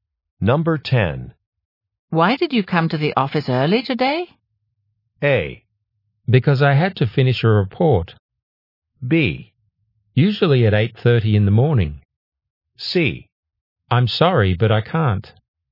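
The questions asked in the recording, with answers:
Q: Why did you come to the office early today?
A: A: Because I had to finish a report.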